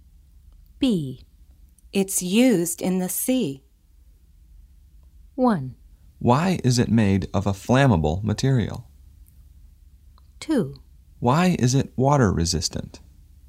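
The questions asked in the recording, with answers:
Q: It's used in the sea.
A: 2: Why is it water resistant?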